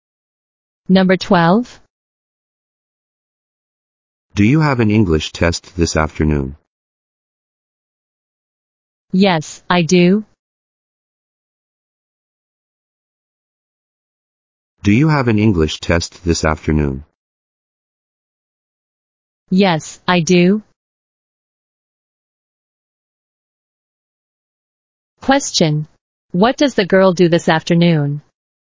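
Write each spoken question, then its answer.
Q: What does the girl do this afternoon?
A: She has an English test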